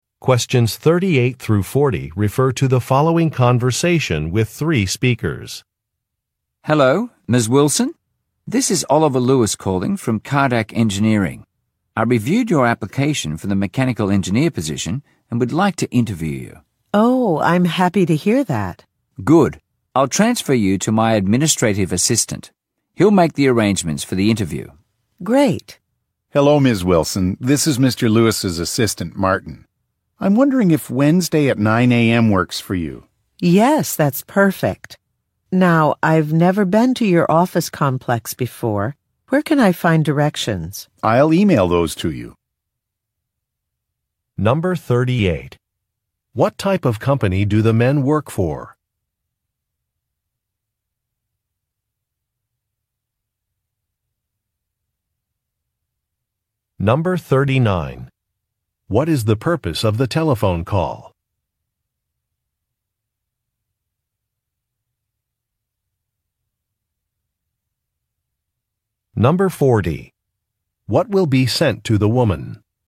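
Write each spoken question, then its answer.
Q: What type of company do the men work for?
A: An engineering company

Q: What is the purpose of the telephone call?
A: To arrange a job interview

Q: What will be sent to the woman?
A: Directions to the office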